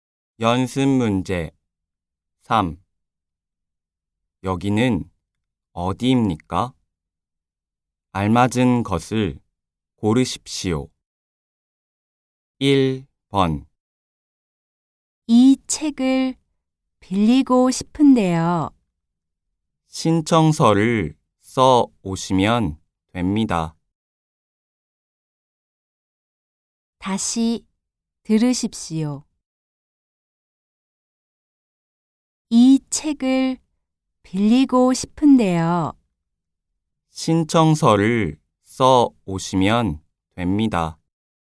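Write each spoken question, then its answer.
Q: 여기는 어디입니까?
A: 도서관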